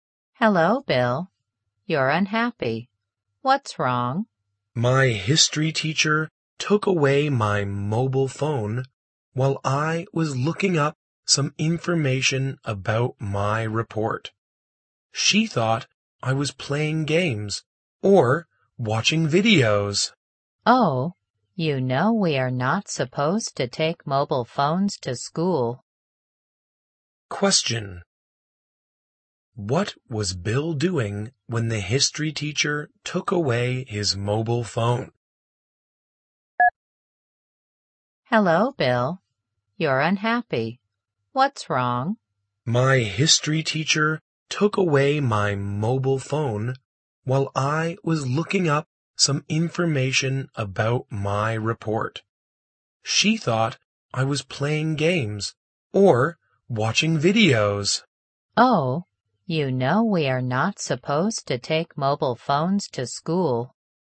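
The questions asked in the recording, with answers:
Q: What was Bill doing when the history teacher took away his mobile phone?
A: Looking up information for his report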